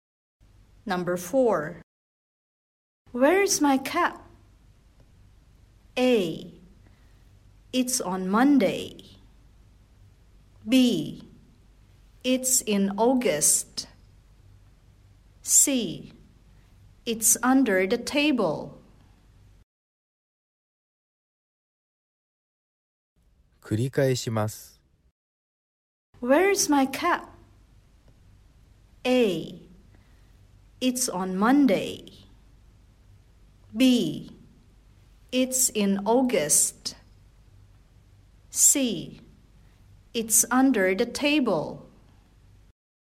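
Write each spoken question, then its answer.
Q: Where is my cap?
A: C: It's under the table.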